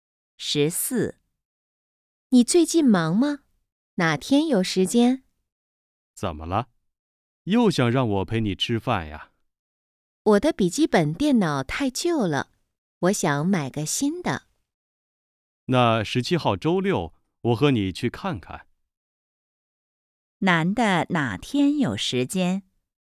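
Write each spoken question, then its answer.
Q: 男的哪天有时间?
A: 17号周六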